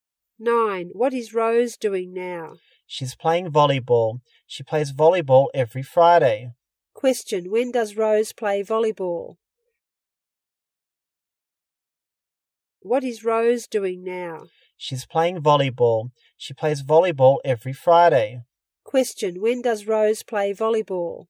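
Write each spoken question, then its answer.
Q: Question: When does Rose play volleyball?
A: Every Friday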